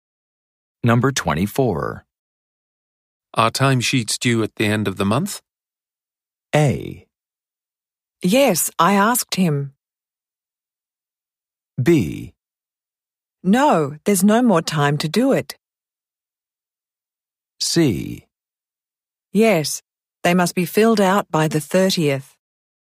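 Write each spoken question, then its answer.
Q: Are timesheets due at the end of the month?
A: C: Yes, they must be filled out by the 30th.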